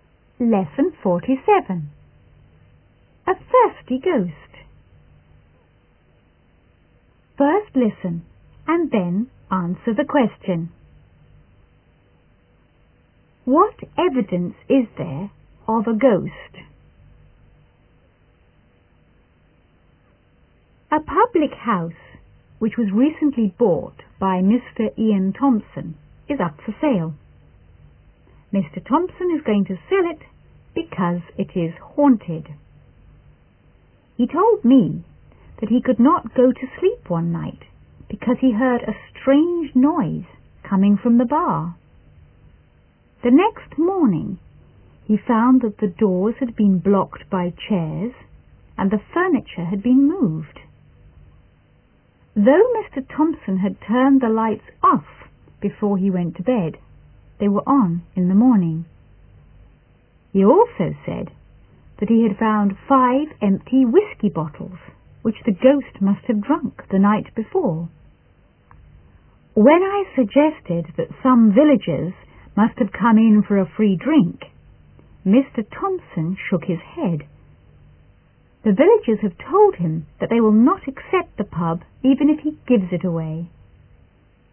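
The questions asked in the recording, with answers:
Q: What evidence is there of a ghost?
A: Strange noises from the bar, doors blocked by chairs, furniture moved, lights turned on, and five empty whisky bottles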